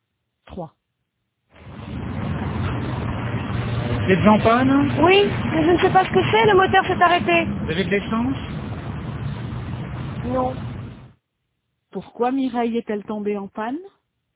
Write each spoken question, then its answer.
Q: Pourquoi Mireille est-elle tombée en panne?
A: Parce qu'elle n'avait plus d'essence.